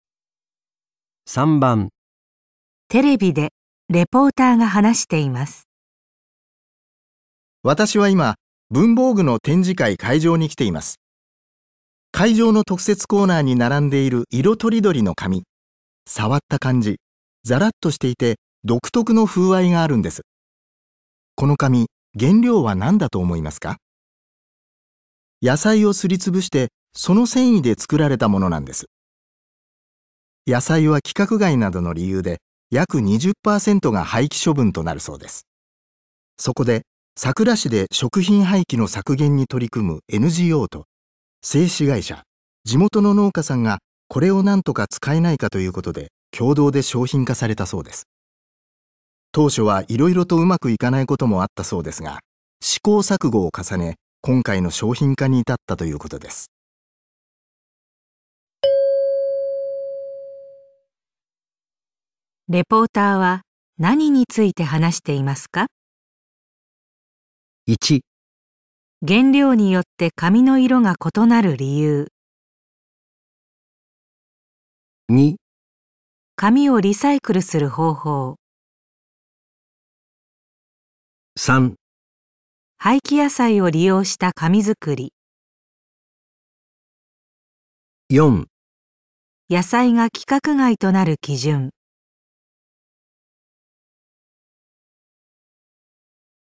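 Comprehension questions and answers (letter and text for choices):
レポーターは何について話していますか。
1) 原料によって紙の色が異なる理由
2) 紙をリサイクルする方法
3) 廃棄野菜を利用した紙作り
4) 野菜が規格外となる基準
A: 3) 廃棄野菜を利用した紙作り

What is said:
野菜は規格外などの理由で約20%が廃棄処分となるそうです。そこで桜市で 食品廃棄の削減に取り組むと製紙会社、地元の農家さんがこれを何とか使えないかということで共同 で商品化されたそうです。 当初はいろいろとうまくいかないこともあったそうですが、試行錯誤を重ね、今回の 商品化に至ったということです。

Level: N1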